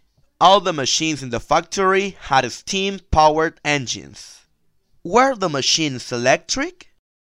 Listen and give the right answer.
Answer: No, they were not electric.